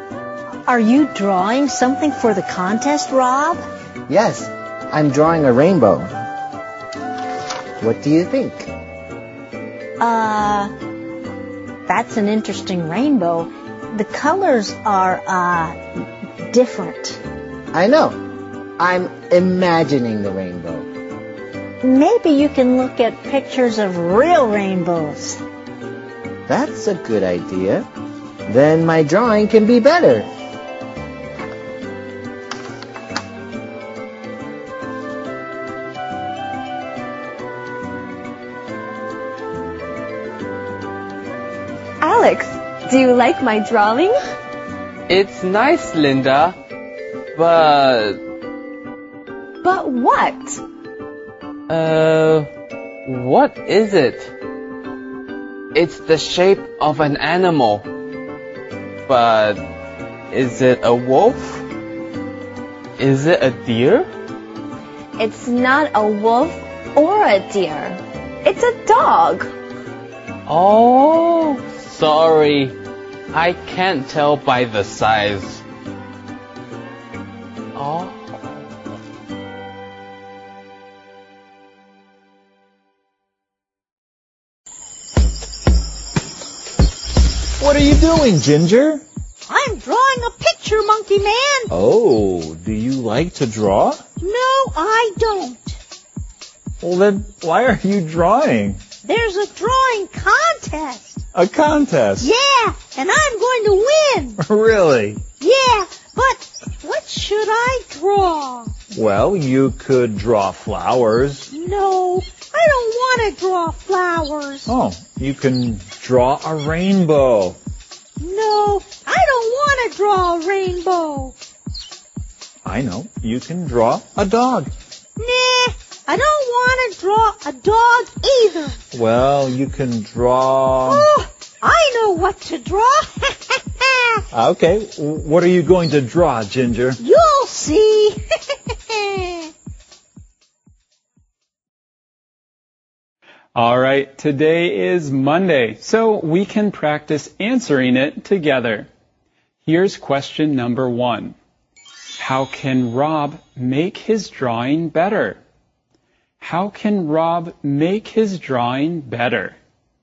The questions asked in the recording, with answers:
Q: How can Rob make his drawing better?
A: He can look at some pictures of rainbows.